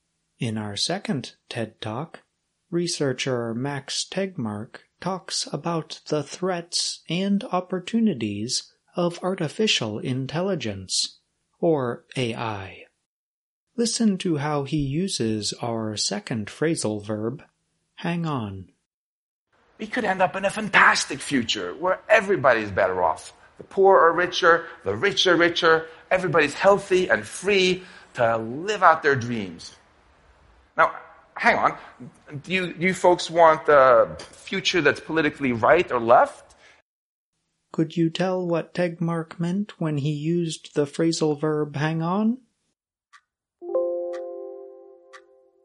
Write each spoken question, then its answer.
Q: Could you tell what Tegmark meant when he used the phrasal verb hang on?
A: hang on means wait for a short time

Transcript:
You can tell that long distance calls must have cost a lot years ago because he said, "And now we think nothing of calling all over the world."
#2 Hang on
In our second TED Talk, researcher Max Tegmark talks about the threats and opportunities of artificial intelligence, or AI. Listen to how he uses our second phrasal verb, hang on.
We could end up in a fantastic future where everybody's better off: the poor are richer, the rich are richer, everybody is healthy and free to live out their dreams. Now, hang on. Do you folks want the future that's politically right or left?